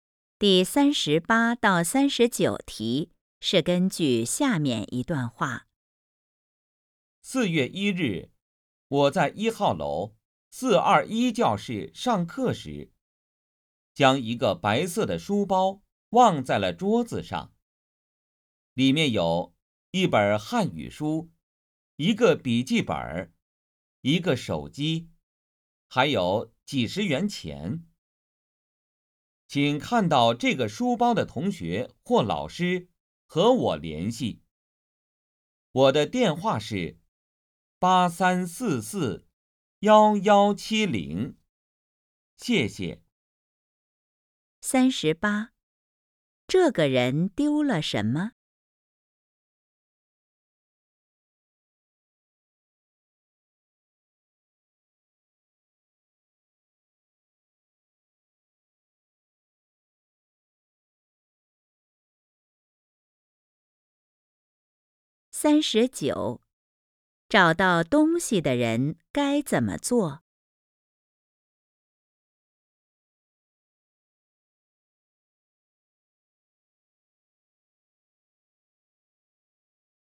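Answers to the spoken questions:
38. 一个白色的书包
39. 打电话和他联系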